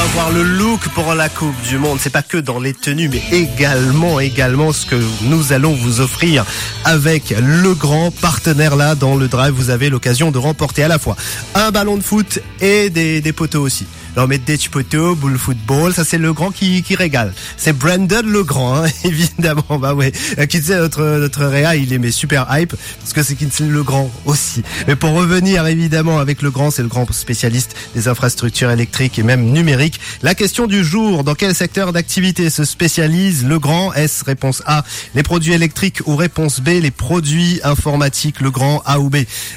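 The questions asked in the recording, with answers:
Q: La question du jour, dans quel secteur d'activité se spécialise le grand?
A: A: les produits électriques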